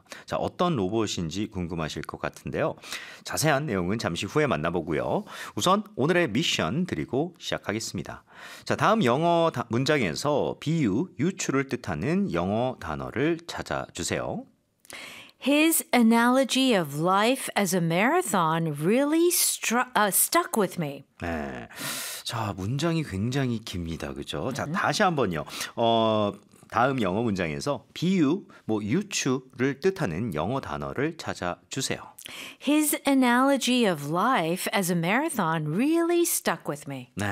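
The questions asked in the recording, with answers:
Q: 다음 영어 문장에서 비유, 뭐 유추를 뜻하는 영어 단어를 찾아주세요.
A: analogy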